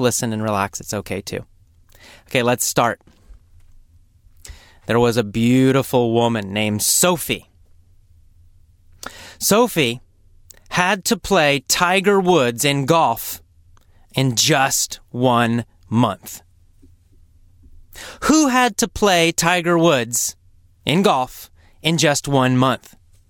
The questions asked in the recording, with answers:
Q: Who had to play Tiger Woods in golf in just 1 month?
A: Well, Sophie.